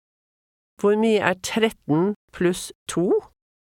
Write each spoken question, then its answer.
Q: Hvor mye 13 pluss 2?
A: 15.